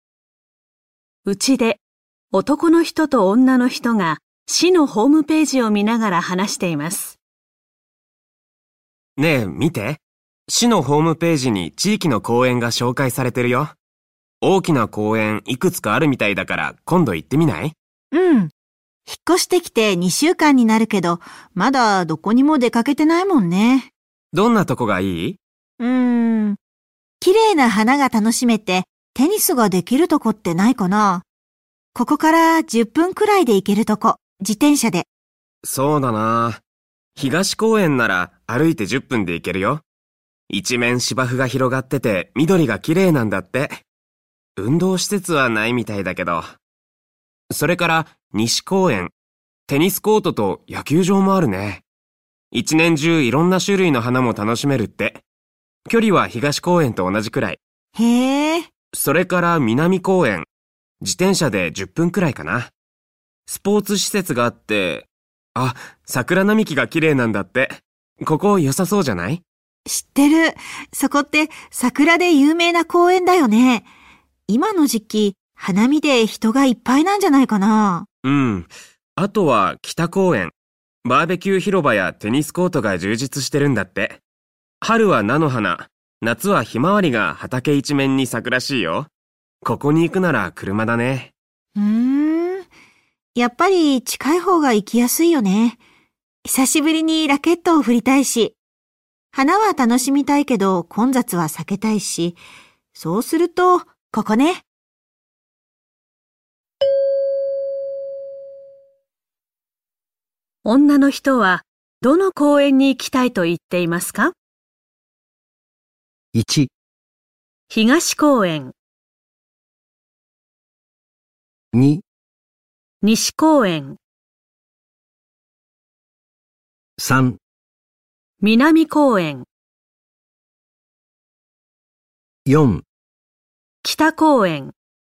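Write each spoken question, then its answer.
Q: 女の人はどの公園に行きたいと言っていますか?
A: 2: 西公園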